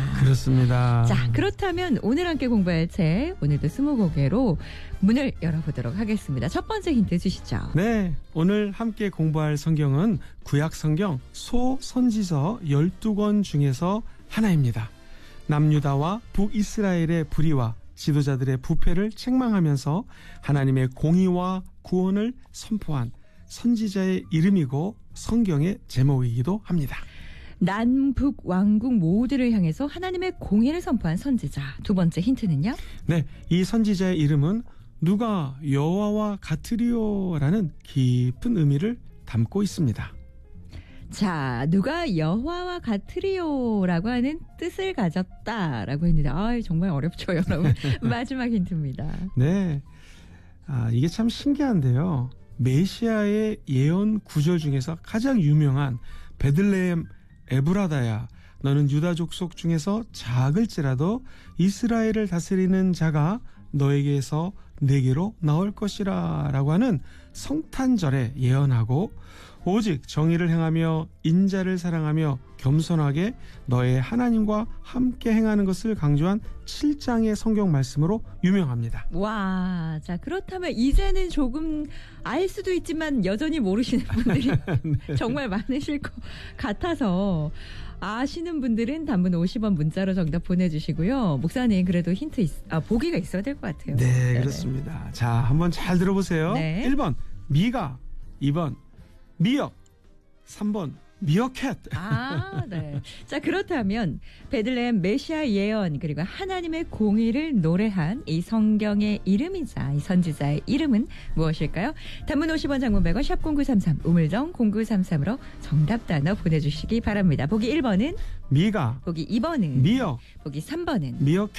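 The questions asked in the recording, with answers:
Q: 베들레헴 메시아 예언 그리고 하나님의 공의를 노래한 이 성경의 이름이자 이 선지자의 이름은 무엇일까요?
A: 1번: 미가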